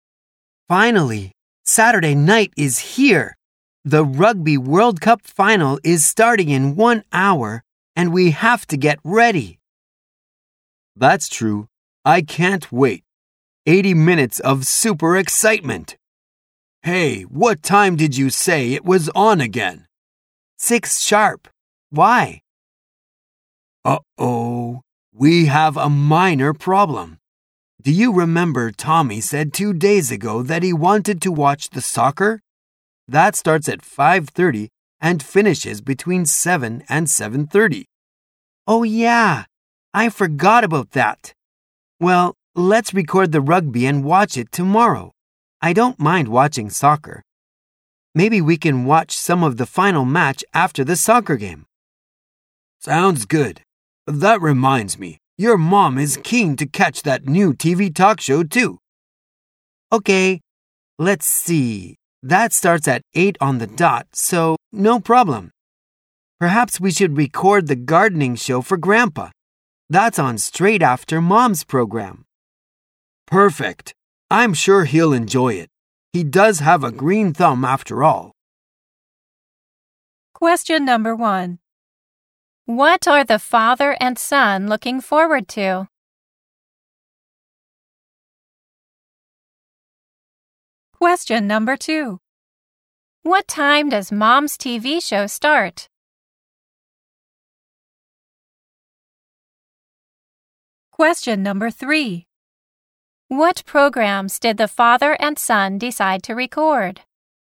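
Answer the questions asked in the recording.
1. Watching the Rugby World Cup final
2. At 8 o'clock
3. The rugby final and the gardening show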